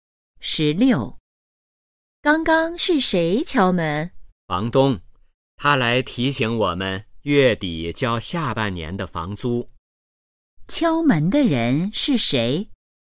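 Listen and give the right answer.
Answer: 房东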